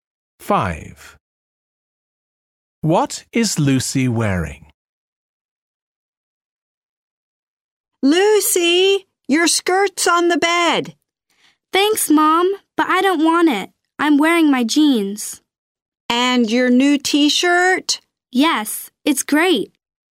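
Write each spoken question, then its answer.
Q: What is Lucy wearing?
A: Her jeans and her new T-shirt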